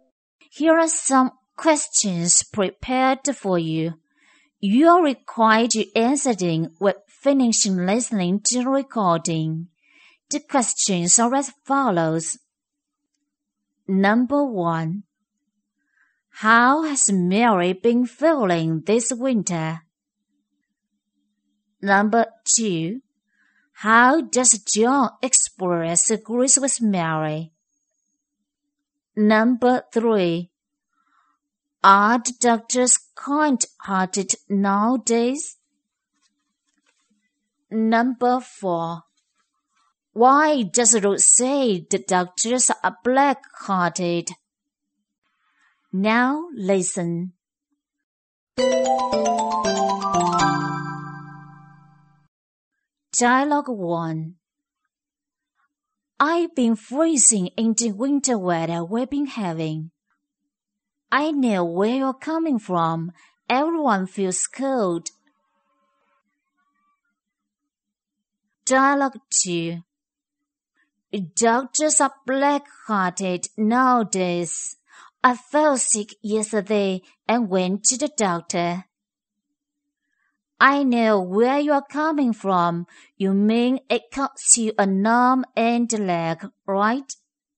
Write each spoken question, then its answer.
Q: How has Mary been feeling this winter?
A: Mary has been feeling freezing this winter.

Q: How does John express agrees with Mary?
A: He agrees with Mary by saying, I know where you are coming from.

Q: Are the doctors kind-hearted nowadays?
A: No, they aren't.

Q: Why does Ruth say the doctors are black-hearted?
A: Because those medical costs are very expensive.